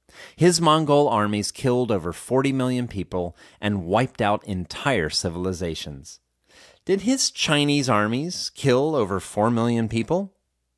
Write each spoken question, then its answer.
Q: Did his Chinese armies kill over 4 million people?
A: No, his Chinese armies didn't kill over 4 million people.